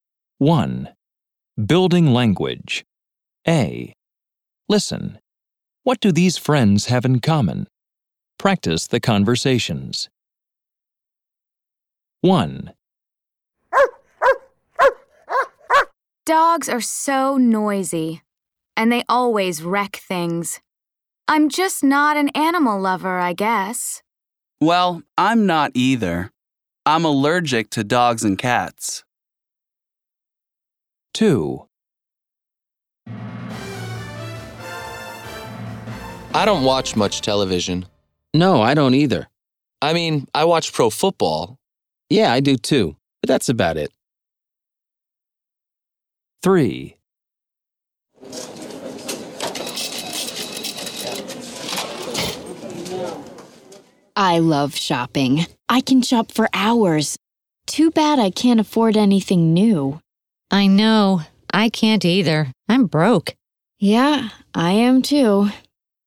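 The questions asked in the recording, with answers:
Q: What do these friends have in common?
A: Neither of them is an animal lover.

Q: What do these friends have in common?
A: They don't watch much TV, only pro football.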